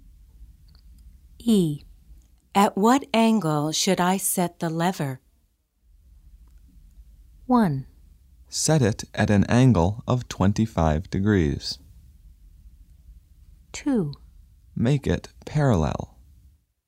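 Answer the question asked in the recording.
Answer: 1: Set it at an angle of 25 degrees.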